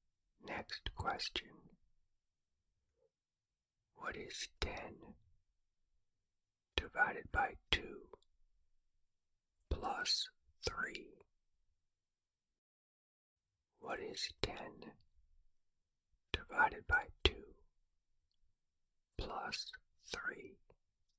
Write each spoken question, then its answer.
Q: What is 10 divided by 2 plus 3?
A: The answer is 8.